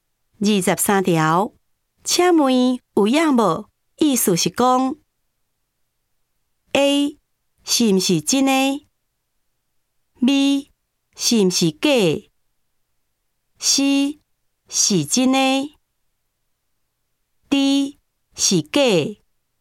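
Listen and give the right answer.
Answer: A: 是毋是真的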